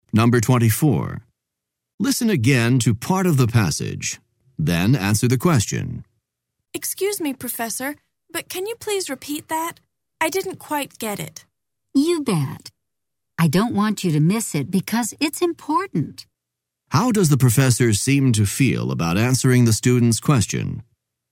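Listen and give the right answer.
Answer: He is glad to repeat it, because the point is important.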